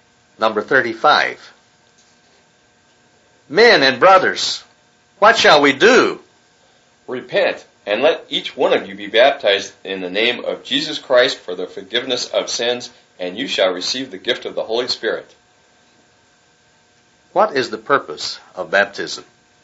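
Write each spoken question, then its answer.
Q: What is the purpose of baptism?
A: The forgiveness of sins (and receiving the gift of the Holy Spirit)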